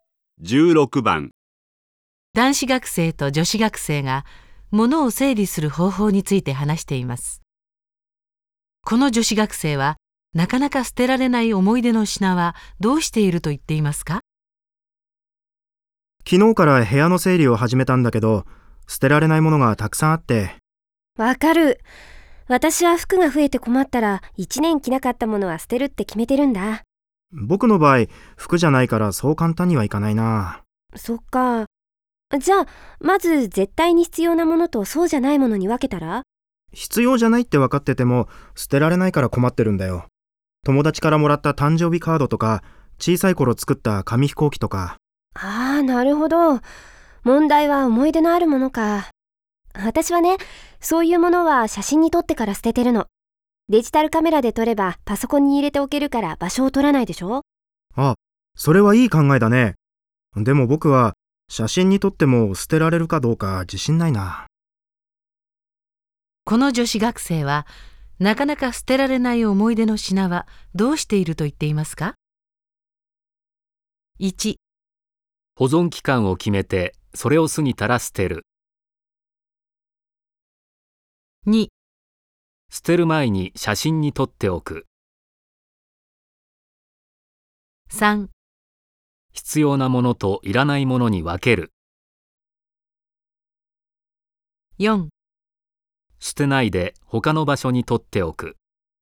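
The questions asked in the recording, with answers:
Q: この女子学生はなかなか捨てられない思い出の品はどうしていると言っていますか?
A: 2: 捨てる前に写真に撮っておく。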